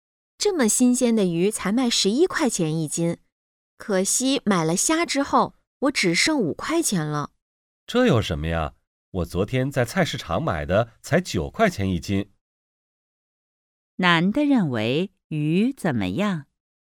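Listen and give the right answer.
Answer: 贵,不便宜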